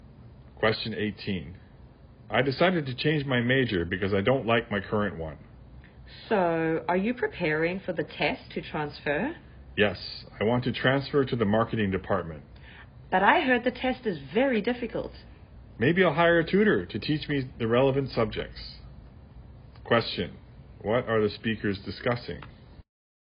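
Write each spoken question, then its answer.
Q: What are the speakers discussing?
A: Changing majors and preparing for the test to transfer to the marketing department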